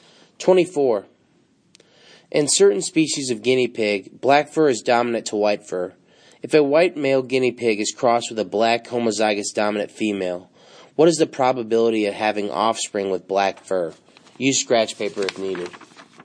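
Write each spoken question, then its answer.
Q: If a white male guinea pig is crossed with a black homozygous dominant female, what is the probability of having offspring with black fur?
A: A: 100%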